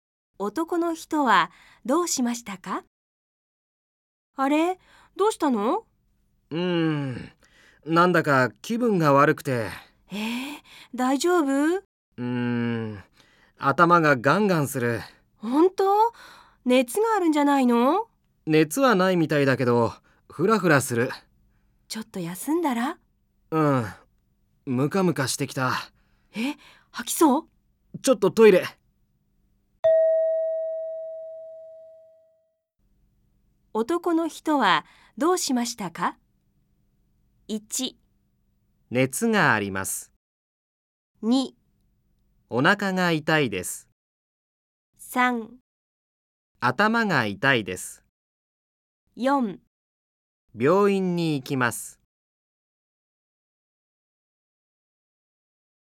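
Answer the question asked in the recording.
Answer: 3: 頭が痛いです。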